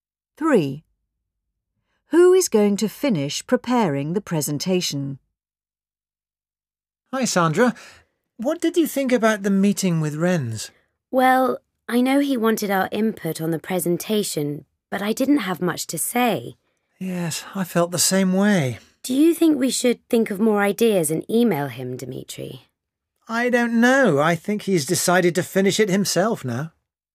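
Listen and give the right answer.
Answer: Renz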